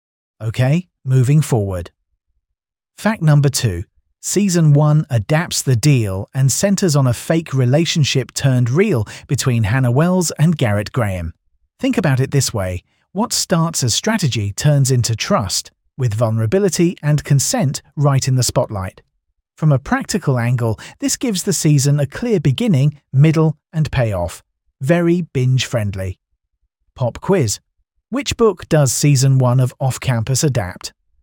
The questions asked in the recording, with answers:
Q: Which book does Season 1 of Off Campus adapt?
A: The Deal.